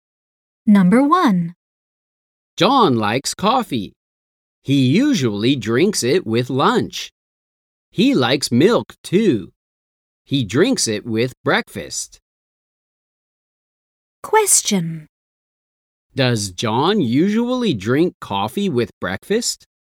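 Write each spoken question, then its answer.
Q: Does John usually drink coffee with breakfast?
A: No, he doesn't. He drinks it with lunch.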